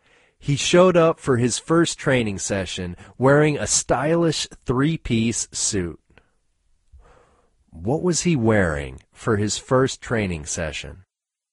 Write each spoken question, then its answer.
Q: What was he wearing for his first training session?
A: He was wearing a stylish three-piece suit.